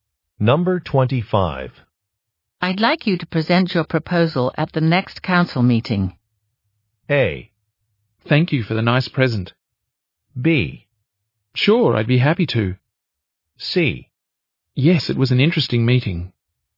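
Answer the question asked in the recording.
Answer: B: Sure, I'd be happy to.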